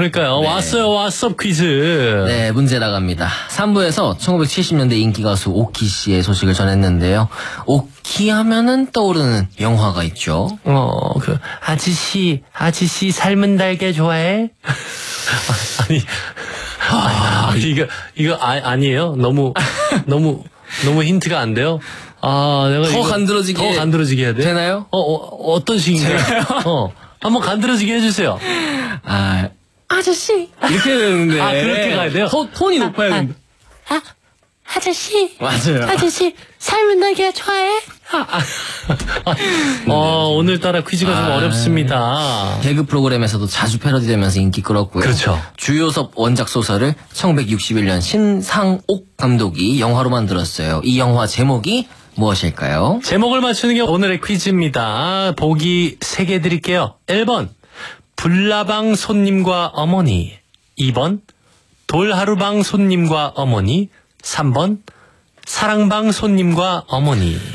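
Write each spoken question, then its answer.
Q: 이 영화 제목이 무엇일까요?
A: 3: 사랑방 손님과 어머니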